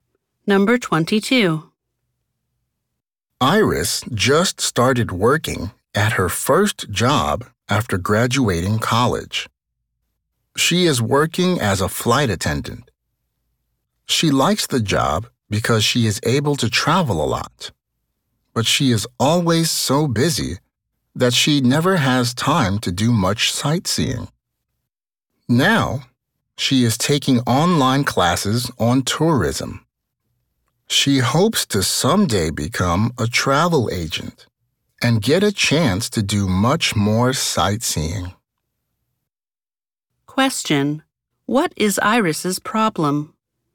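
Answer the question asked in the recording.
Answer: She is always so busy that she never has time to do much sightseeing.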